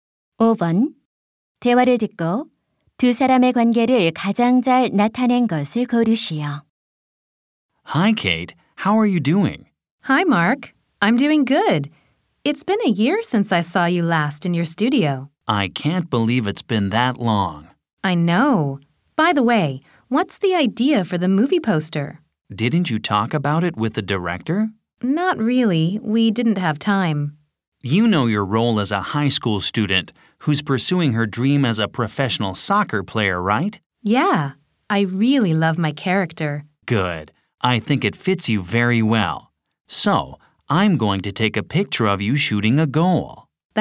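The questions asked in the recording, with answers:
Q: 대화를 듣고 두 사람의 관계를 가장 잘 나타낸 것을 고르시오.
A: 사진작가 - 영화배우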